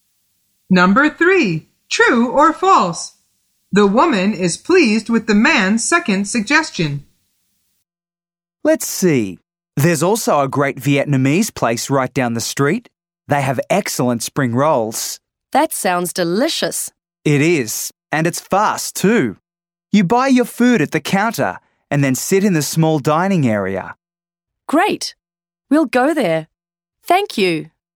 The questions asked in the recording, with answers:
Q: The woman is pleased with the man's second suggestion.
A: The answer is true.